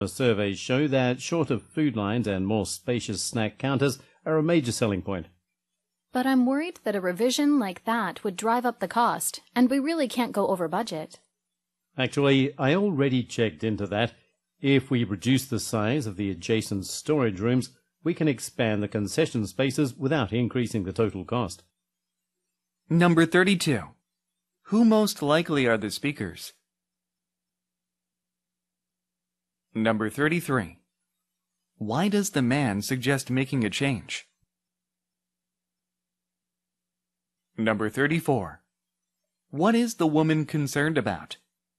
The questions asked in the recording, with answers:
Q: Why does the man suggest making a change?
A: A번, to satisfy customer preferences.